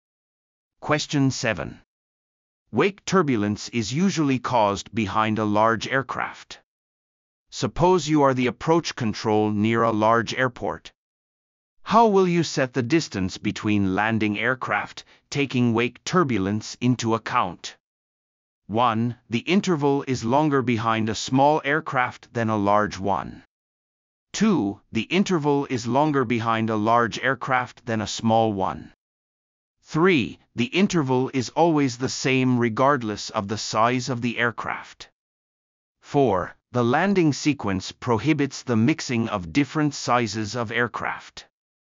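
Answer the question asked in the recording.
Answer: 2: The interval is longer behind a large aircraft than a small one.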